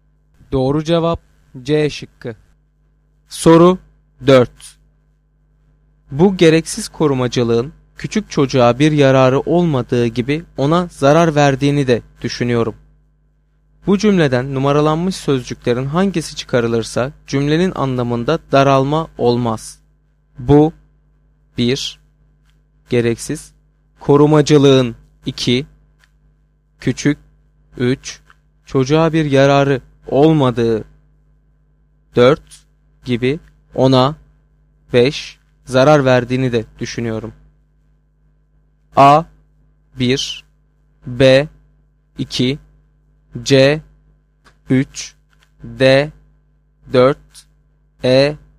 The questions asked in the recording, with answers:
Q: Bu cümleden numaralanmış sözcüklerin hangisi çıkarılırsa cümlenin anlamında daralma olmaz.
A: Doğru cevap E şıkkı.